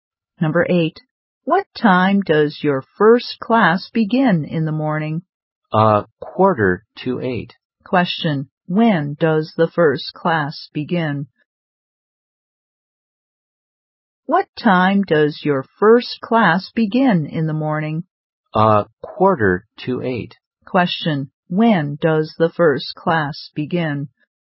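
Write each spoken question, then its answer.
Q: Question, when does the first class begin?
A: At a quarter to eight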